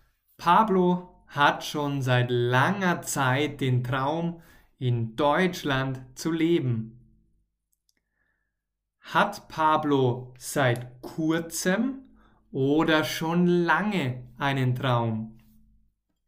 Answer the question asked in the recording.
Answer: Schon lange. Er hat schon lange einen Traum.